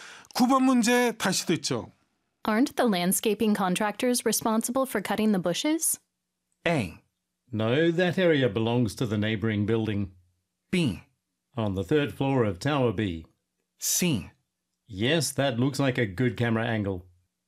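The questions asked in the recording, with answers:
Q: Aren't the landscaping contractors responsible for cutting the bushes?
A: A: No, that area belongs to the neighboring building.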